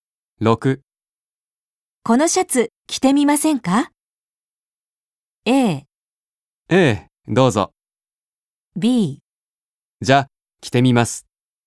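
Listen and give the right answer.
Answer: B: じゃ、着てみます。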